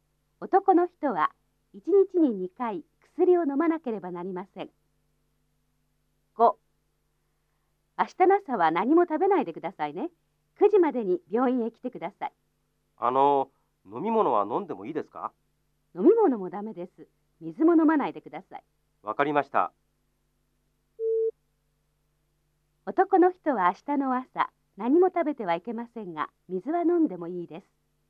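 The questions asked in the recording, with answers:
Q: 男の人は明日の朝、何も食べてはいけませんが、水は飲んでもいいです。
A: ×(間違い)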